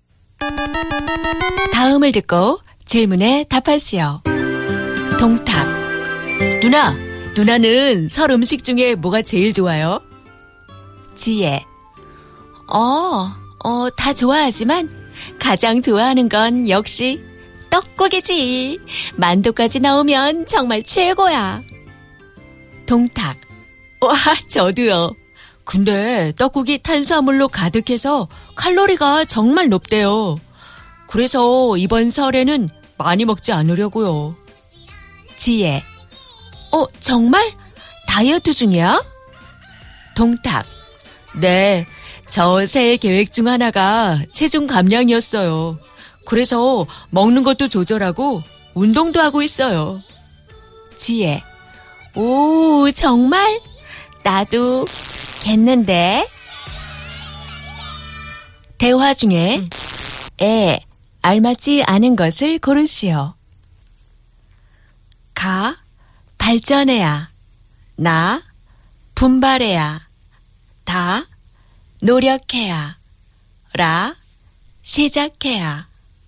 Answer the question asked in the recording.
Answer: Ga,